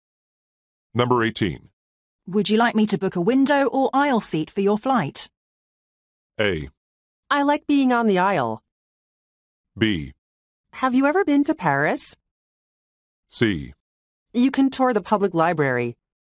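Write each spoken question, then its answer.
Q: Would you like me to book a window or aisle seat for your flight?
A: A: I like being on the aisle.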